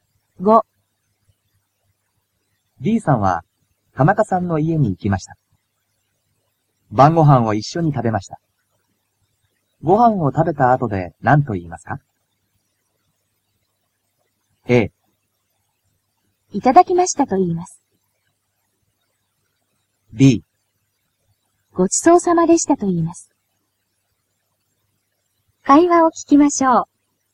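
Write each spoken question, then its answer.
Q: ご飯を食べた後で何と言いますか?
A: B: ごちそうさまでしたと言います。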